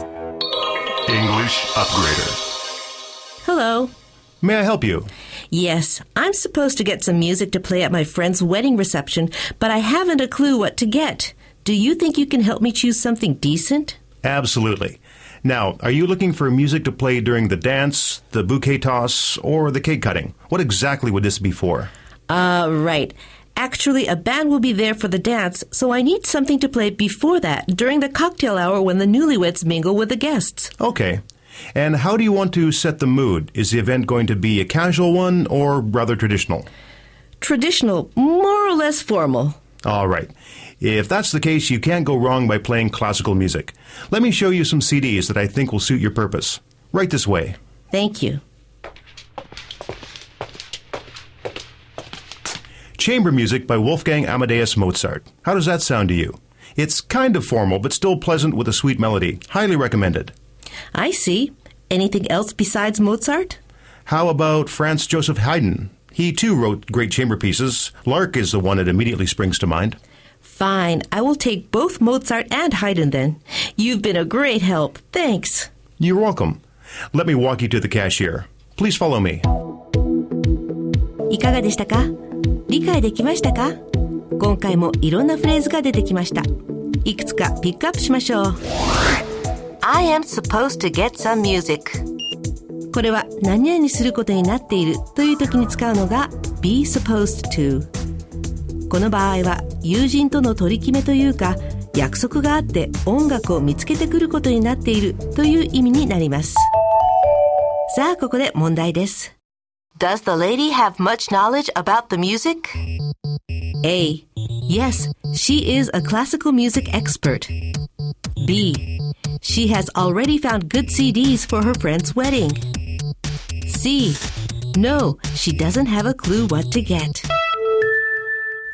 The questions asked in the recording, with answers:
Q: Does the lady have much knowledge about the music?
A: 正解は C. No, she doesn't have a clue what to get でした。